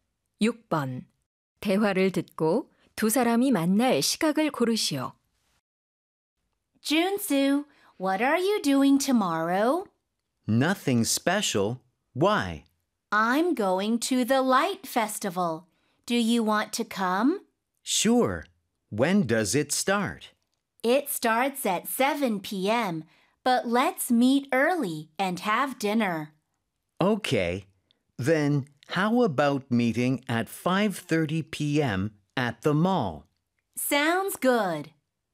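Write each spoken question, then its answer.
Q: 대화를 듣고 두 사람이 만날 시각을 고르시오.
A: 오후 5시 30분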